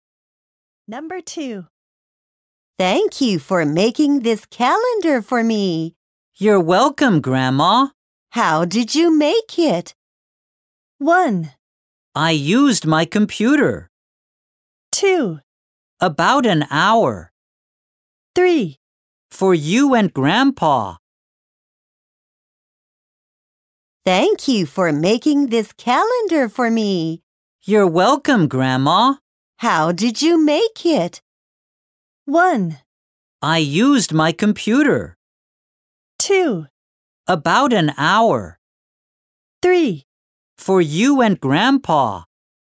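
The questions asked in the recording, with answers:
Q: How did you make it?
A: 1: I used my computer.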